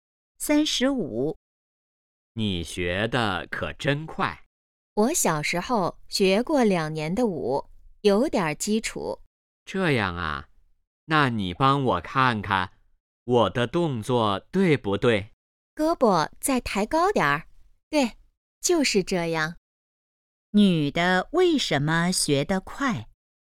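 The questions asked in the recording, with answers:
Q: 女的为什么学得快?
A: 小时候学过两年舞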